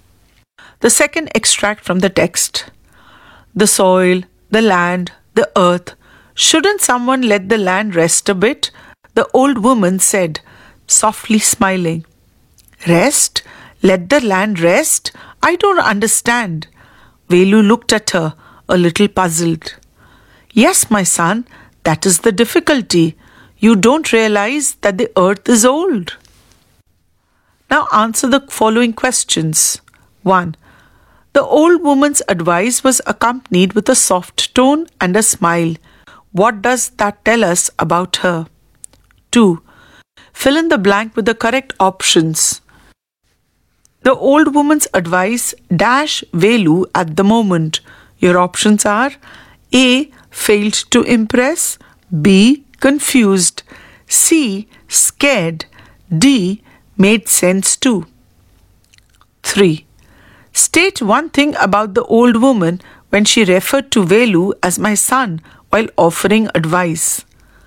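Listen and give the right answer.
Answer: B: Confused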